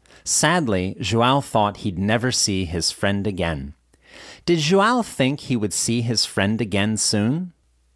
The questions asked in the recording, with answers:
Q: Did João think he would see his friend again soon?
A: No, he didn't. João thought he would never see his friend again.